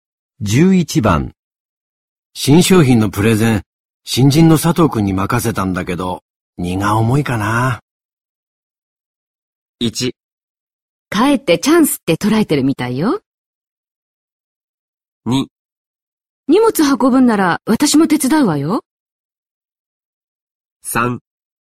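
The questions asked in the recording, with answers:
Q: 新商品のプレゼン、新人の佐藤くんに任せたんだけど、荷が重いかな。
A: 1: かえってチャンスって捉えてるみたいよ。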